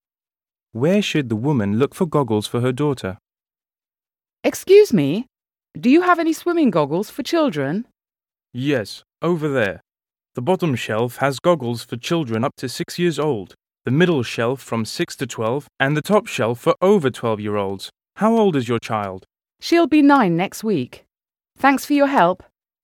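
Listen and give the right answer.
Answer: The middle shelf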